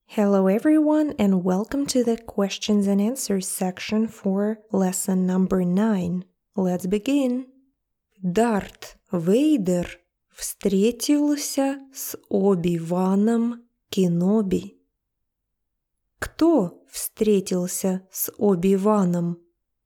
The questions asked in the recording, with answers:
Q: Кто встретился с Оби-Ваном?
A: Дарт Вейдер встретился с Оби-Ваном.